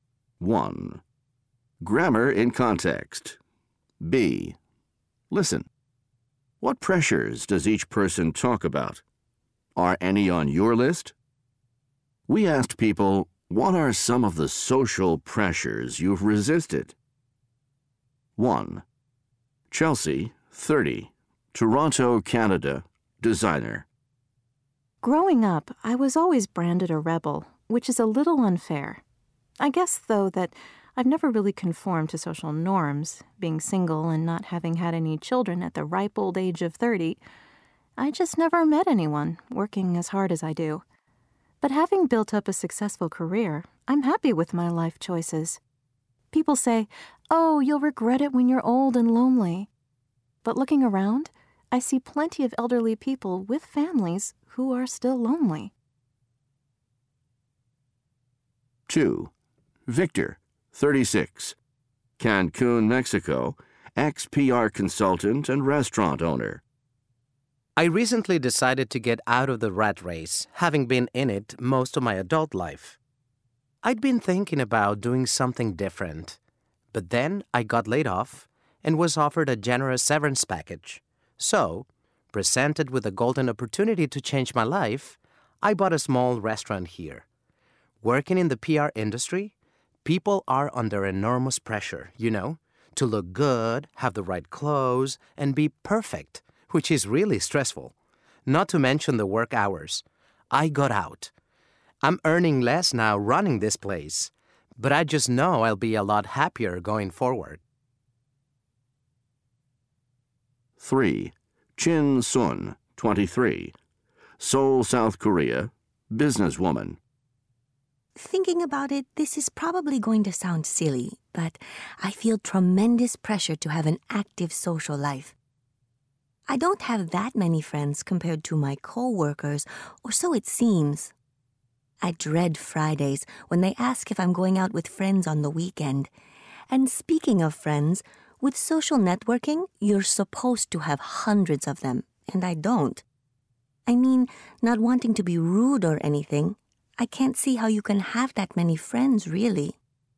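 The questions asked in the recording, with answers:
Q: What pressures does each person talk about?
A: Chelsea: pressure to conform, get married and have children; Victor: pressure in PR to look good, wear the right clothes, be perfect, and work long hours; Chin Sun: pressure to have an active social life and many friends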